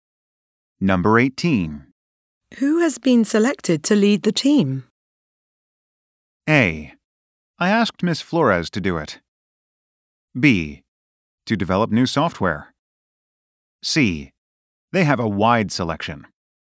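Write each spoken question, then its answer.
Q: Who has been selected to lead the team?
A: A: I asked Ms. Flores to do it.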